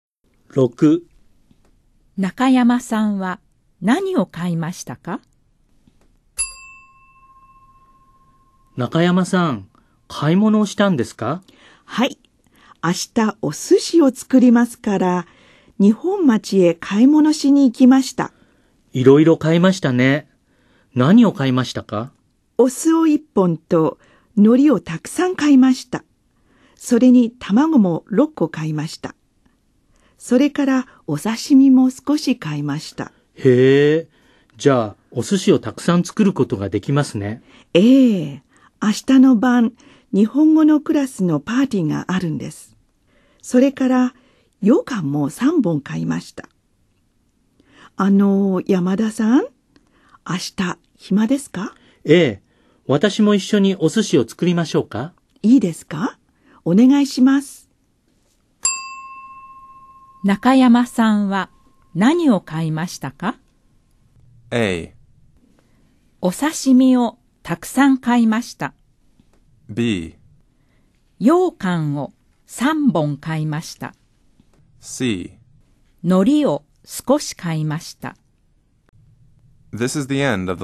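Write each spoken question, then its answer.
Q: 中山さんは何を買いましたか?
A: B: 羊羹を3本買いました。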